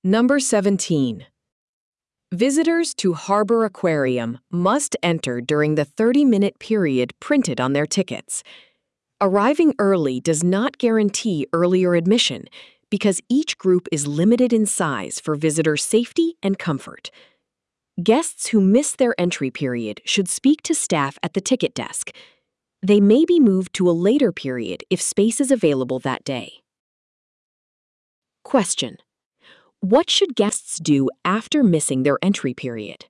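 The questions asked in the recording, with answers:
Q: What should guests do after missing their entry period?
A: Speak to staff at the ticket desk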